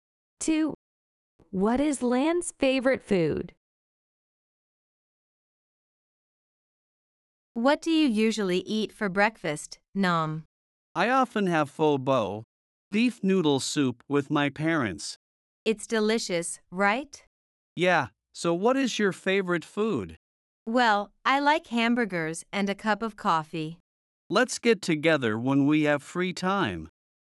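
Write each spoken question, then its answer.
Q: What is Lan's favorite food?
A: Hamburgers and a cup of coffee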